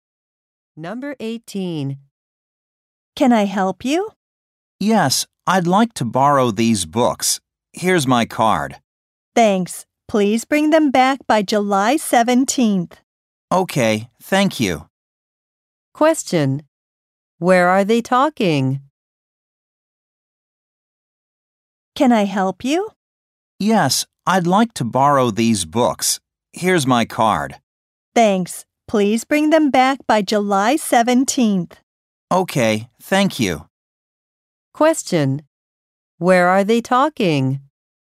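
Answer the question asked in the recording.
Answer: At a library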